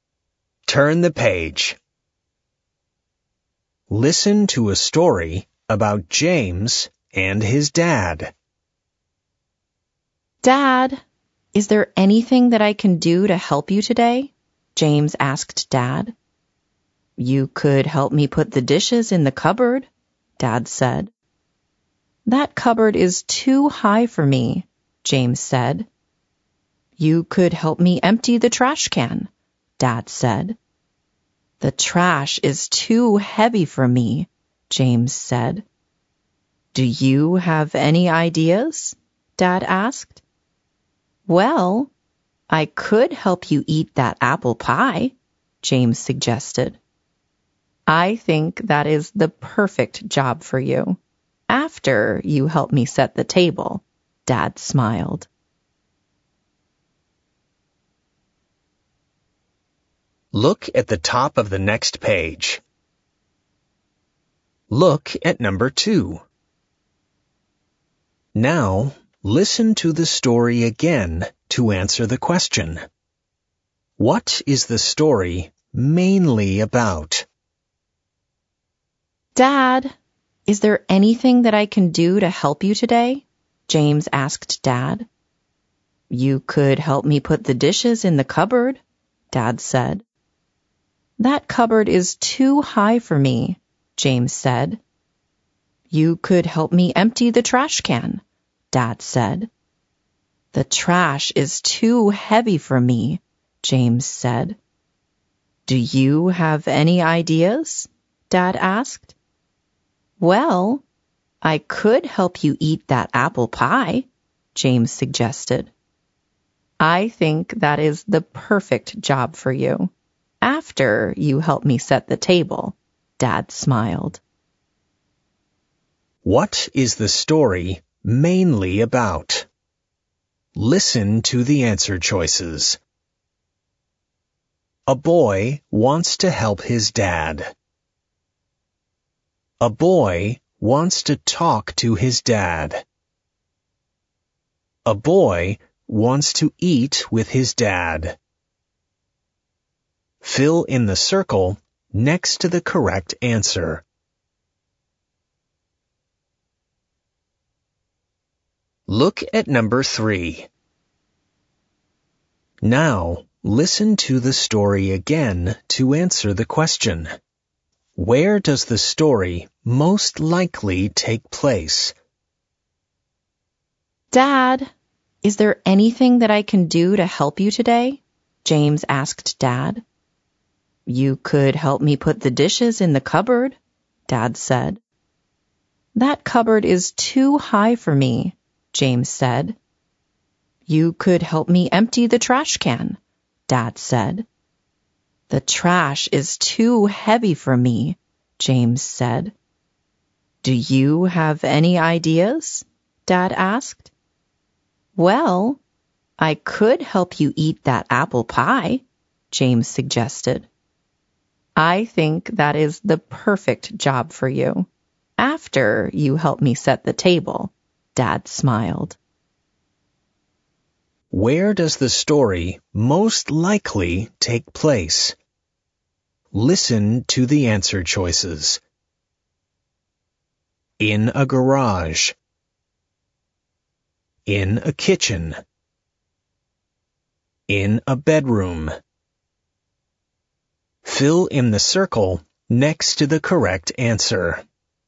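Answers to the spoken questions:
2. A: A boy wants to help his dad.
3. B: In a kitchen.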